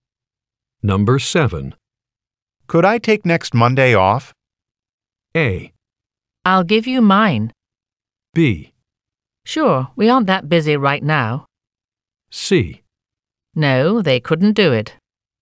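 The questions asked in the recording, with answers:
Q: Could I take next Monday off?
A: B: Sure, we aren't that busy right now.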